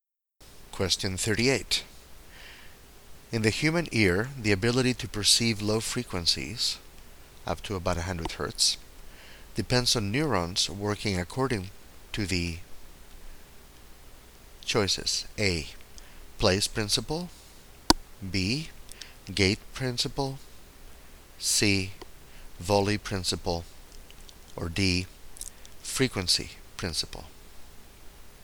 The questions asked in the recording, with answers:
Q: In the human ear, the ability to perceive low frequencies, up to about 100 Hz, depends on neurons working according to the choices: A.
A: The correct choice here is D.